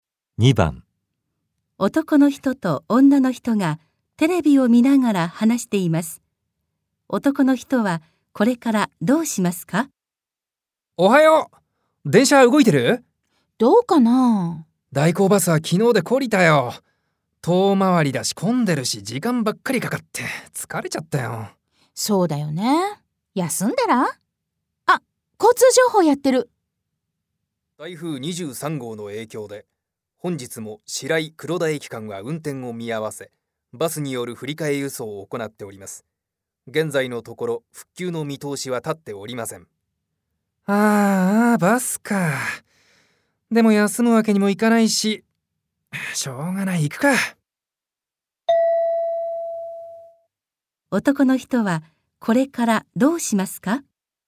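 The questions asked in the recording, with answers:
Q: 男の人はこれからどうしますか?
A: 代行バスで出かける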